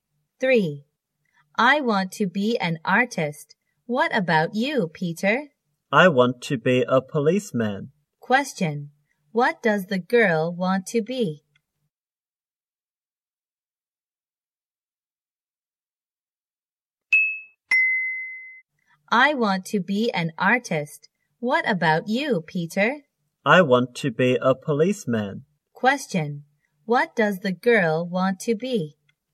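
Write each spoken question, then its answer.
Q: What does the girl want to be?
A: An artist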